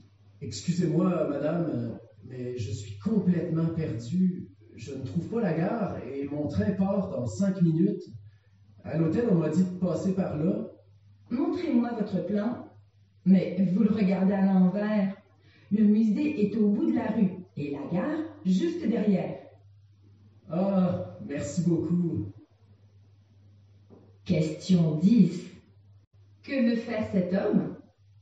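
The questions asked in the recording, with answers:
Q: Que veut faire cet homme?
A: Trouver la gare pour prendre son train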